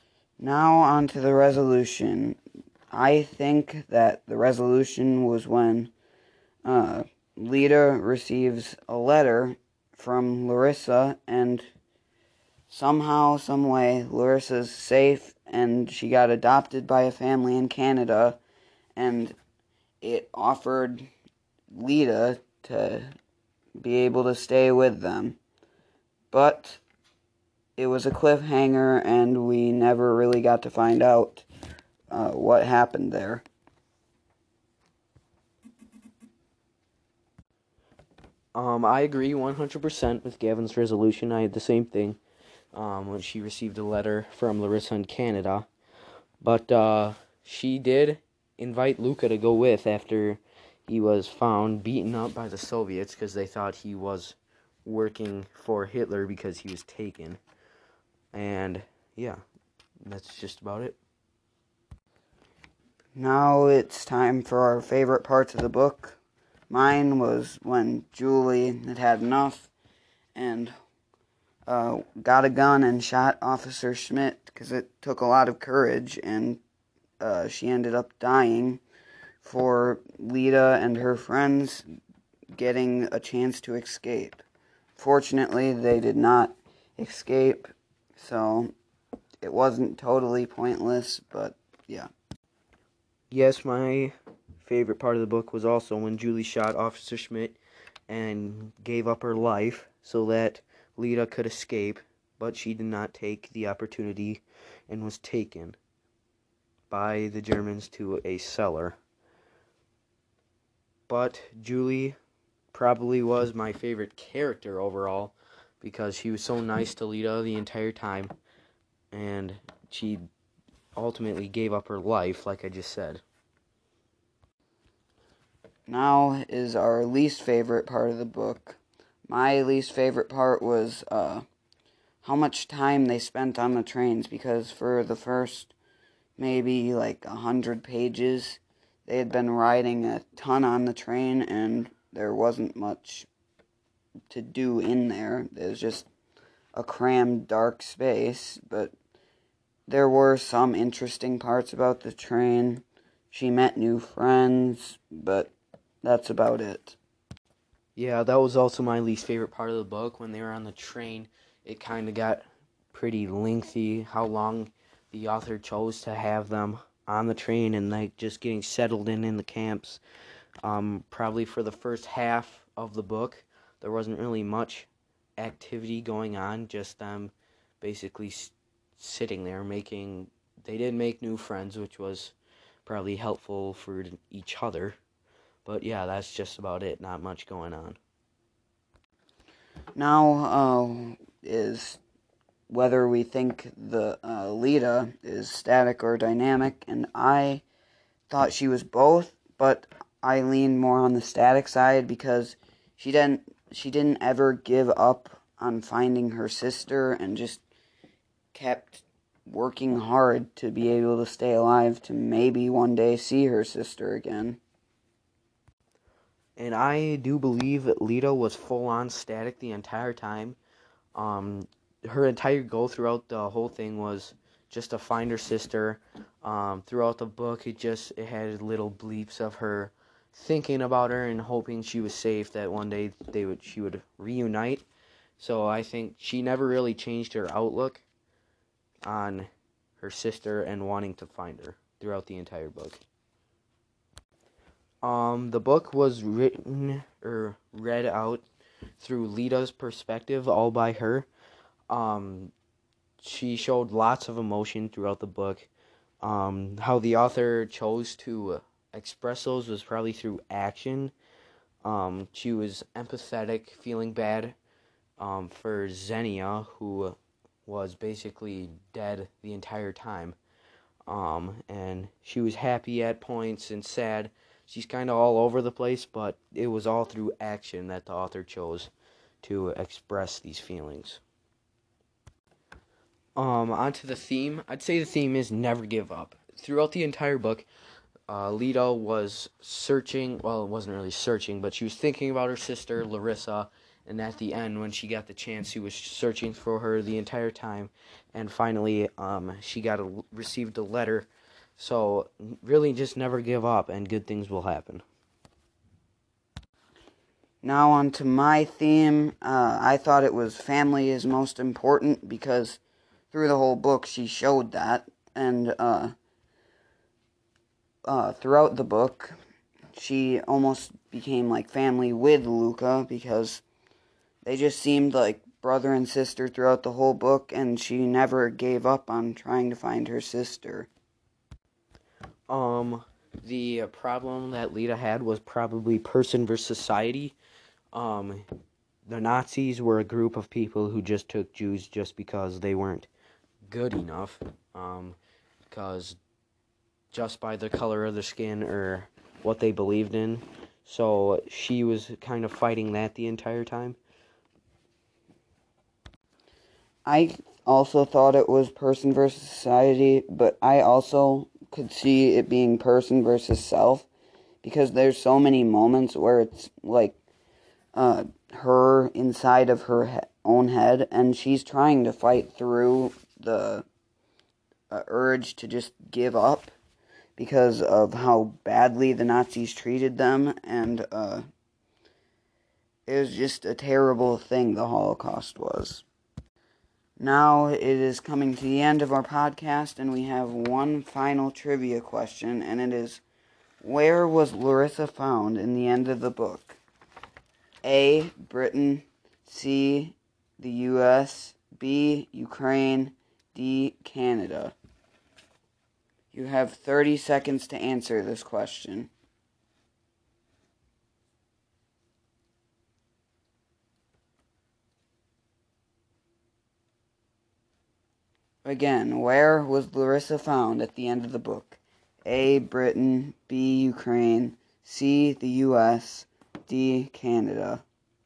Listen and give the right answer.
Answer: If you picked D, Canada, you would be correct